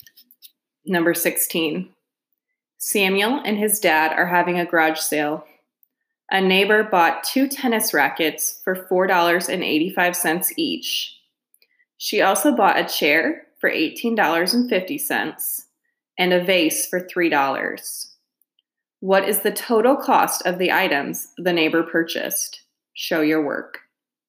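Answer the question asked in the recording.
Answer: $31.20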